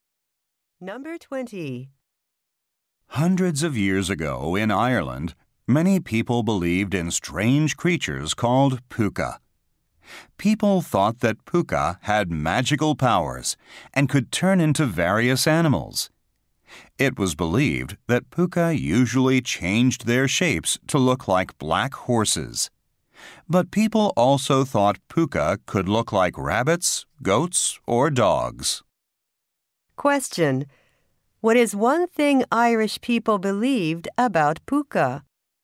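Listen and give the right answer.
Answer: They could change into animals, usually black horses.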